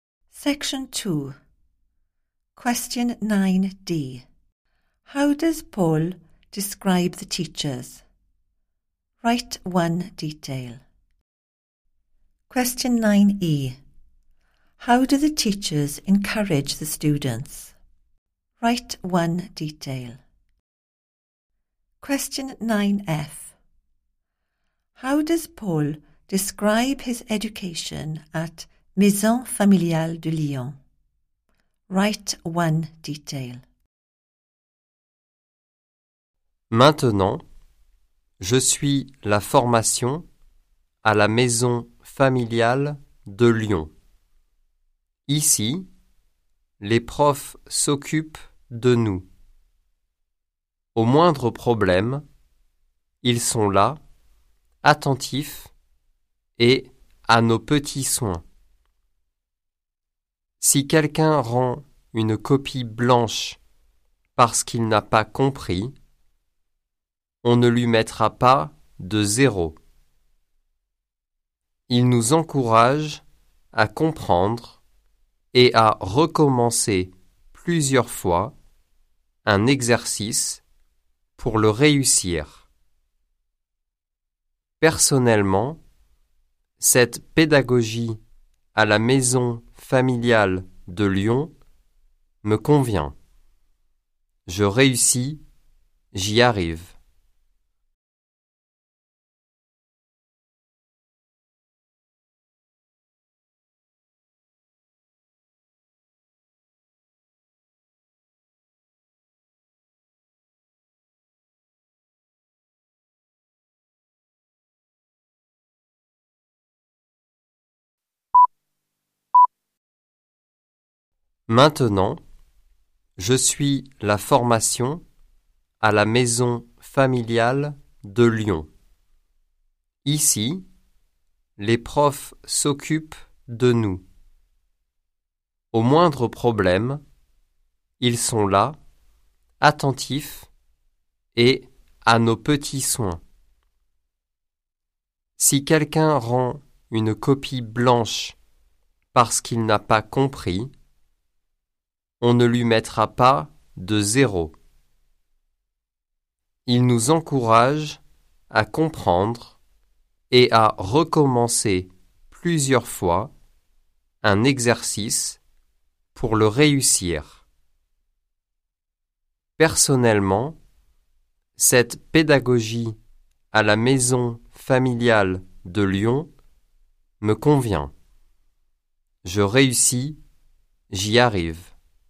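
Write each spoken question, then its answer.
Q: How does Paul describe the teachers?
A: They look after the students and are attentive, there at the slightest problem

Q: How do the teachers encourage the students?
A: They encourage them to understand and to redo an exercise several times until they succeed; no zero for a blank paper

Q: How does Paul describe his education at Maison familiale de Lyon.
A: The teaching method suits him; he is succeeding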